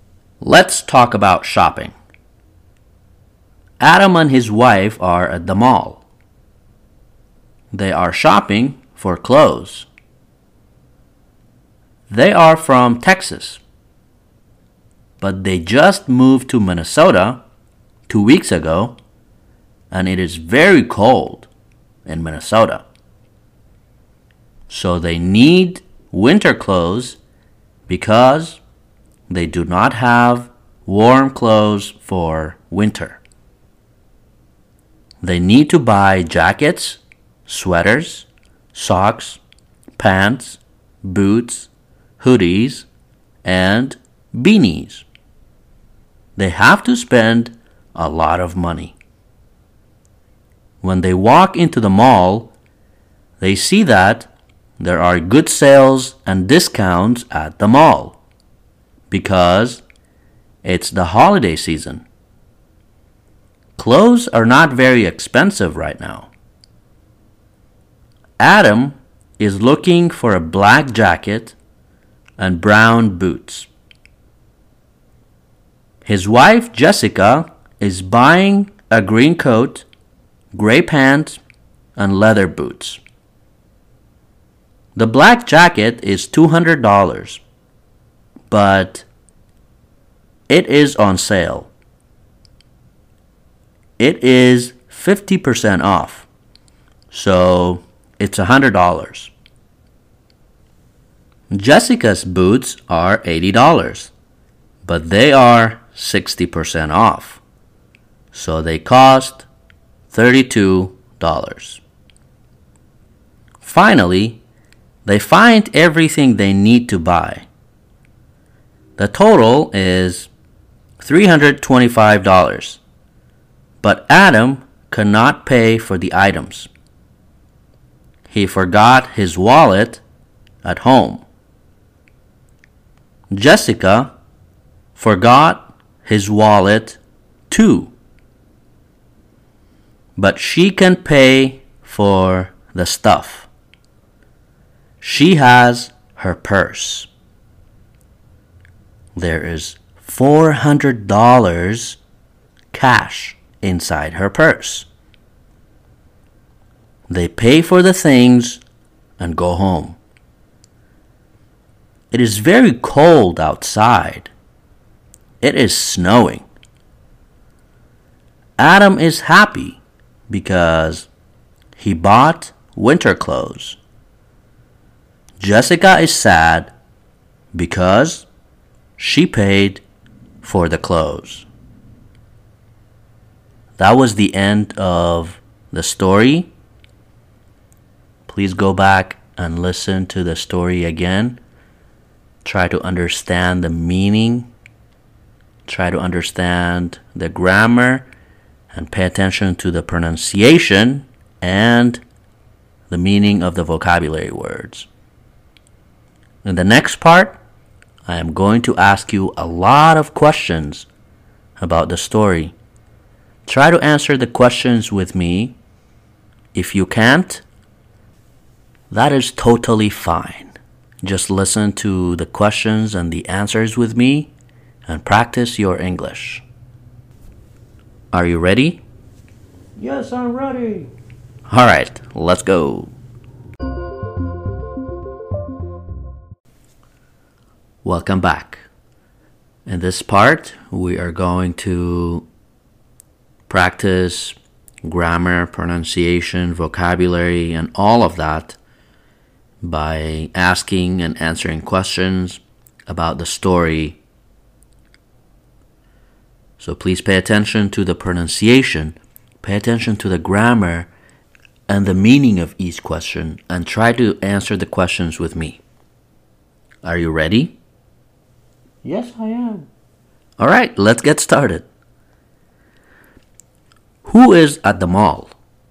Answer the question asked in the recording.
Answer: Adam and his wife.